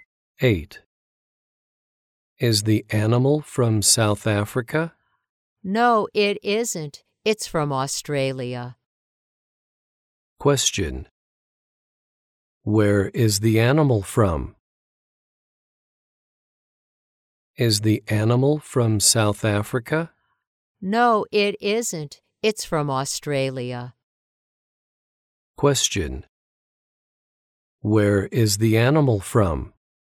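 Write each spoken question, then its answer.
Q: Where is the animal from?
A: Australia.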